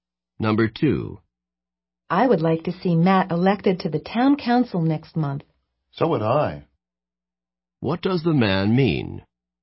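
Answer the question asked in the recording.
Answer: He also wants Matt to be elected to the town council.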